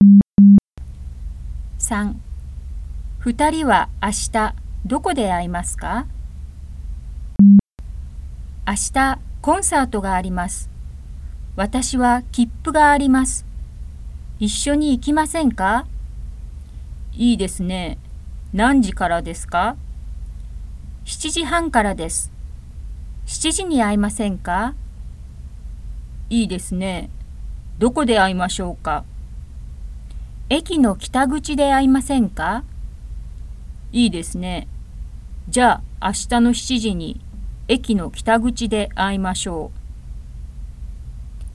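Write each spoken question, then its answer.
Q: 2人は明日どこで会いますか?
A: 駅の北口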